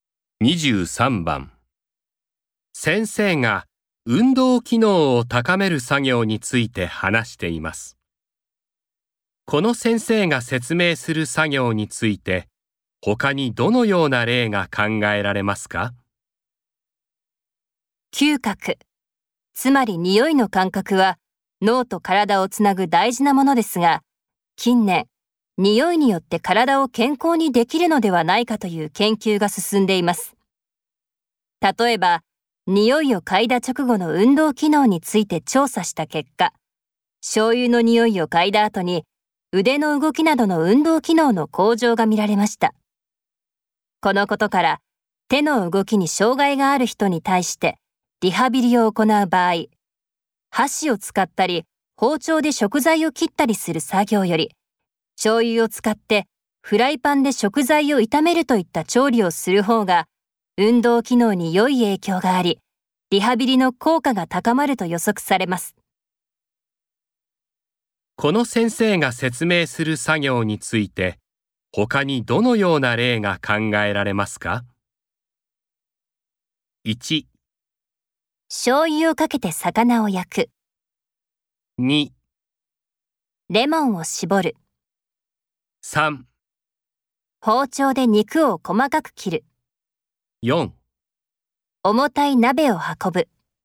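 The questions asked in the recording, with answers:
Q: この先生が説明する作業について、他にどのような例が考えられますか?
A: 1: 醤油をかけて魚を焼く。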